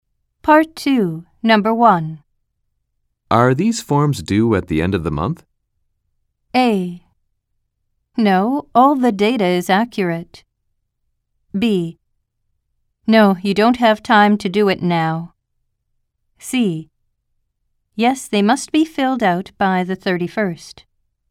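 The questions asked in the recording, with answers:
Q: Are these forms due at the end of the month?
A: C: Yes, they must be filled out by the 31st.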